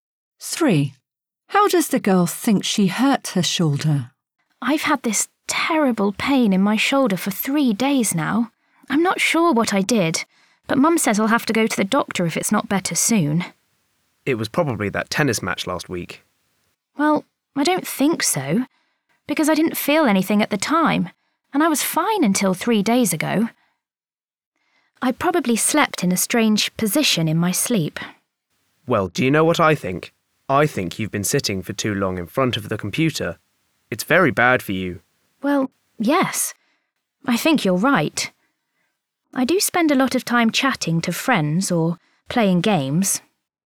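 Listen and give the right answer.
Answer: by sitting too long in front of the computer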